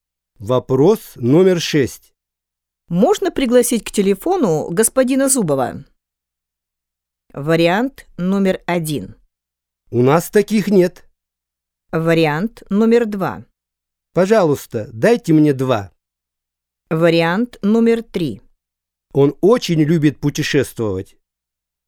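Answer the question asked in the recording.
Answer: 1: У нас таких нет.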